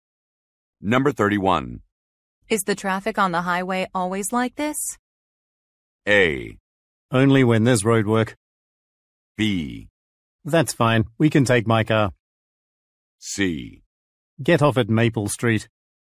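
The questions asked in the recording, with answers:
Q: Is the traffic on the highway always like this?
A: A: Only when there's road work.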